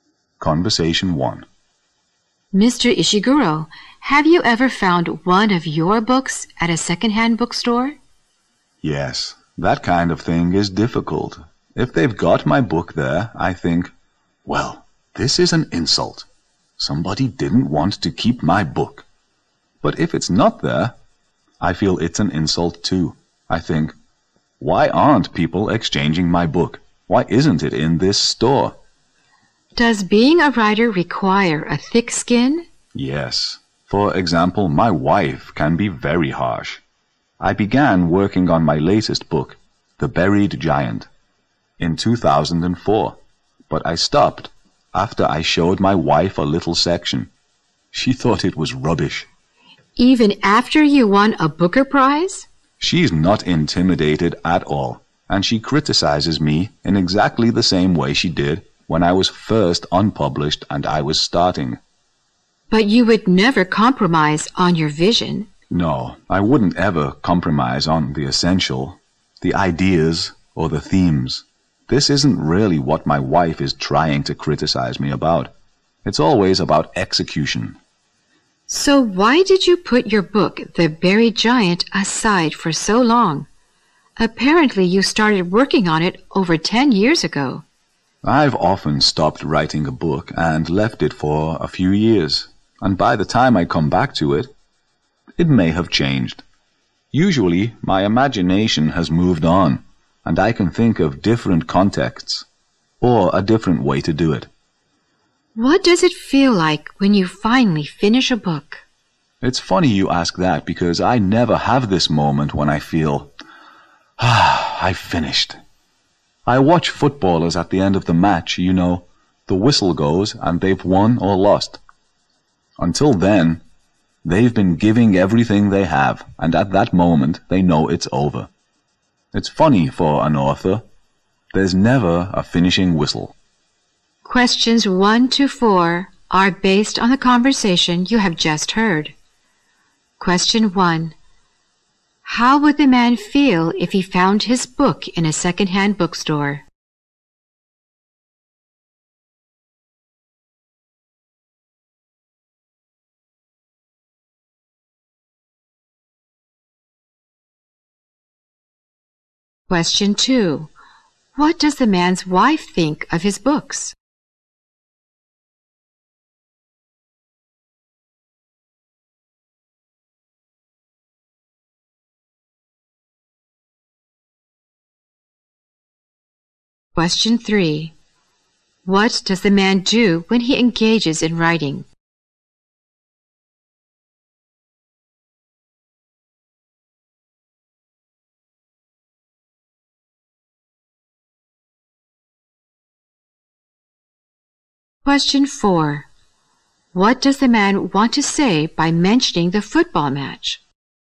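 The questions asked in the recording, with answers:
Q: How would the man feel if he found his book in a secondhand bookstore?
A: Insulted

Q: What does the man want to say by mentioning the football match?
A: He never feels he has finished a book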